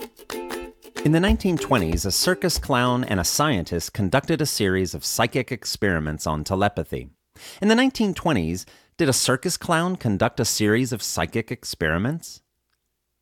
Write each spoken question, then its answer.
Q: In the 1920s, did a circus clown conduct a series of psychic experiments?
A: Yes, in the 1920s, a circus clown conducted a series of psychic experiments.